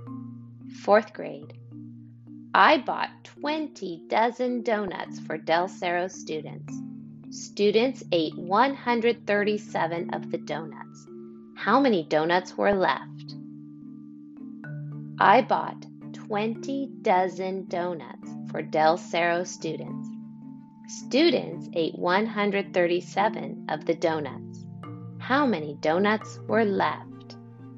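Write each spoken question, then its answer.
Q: How many donuts were left?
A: 103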